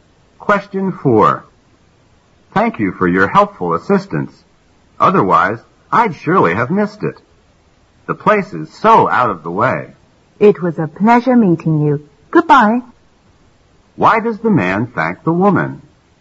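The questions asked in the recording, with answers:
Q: Why does the man thank the woman?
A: She helped him find a place that was hard to find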